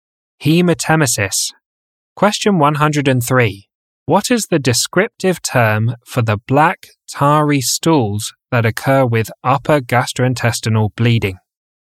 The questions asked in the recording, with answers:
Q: What is the descriptive term for the black, tarry stools that occur with upper gastrointestinal bleeding?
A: Melena.